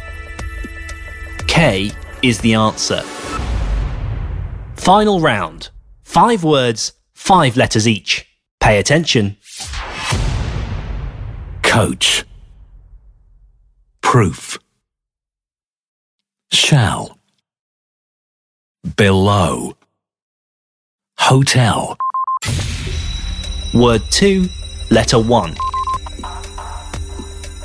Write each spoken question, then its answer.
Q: Word 2, letter 1.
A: P is the answer.